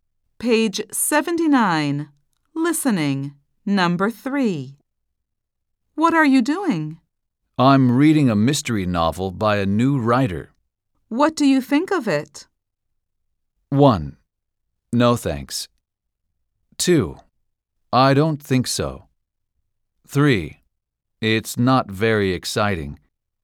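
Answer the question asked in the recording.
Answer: 3: It's not very exciting.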